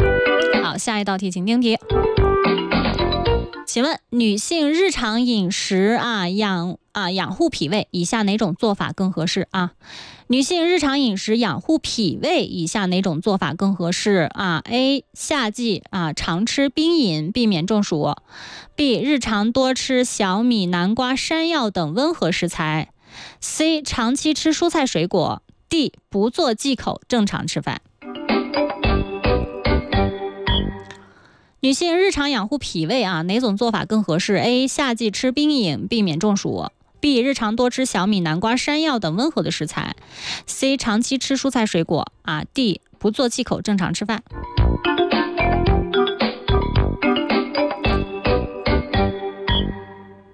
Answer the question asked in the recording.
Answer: B 就是正确答案。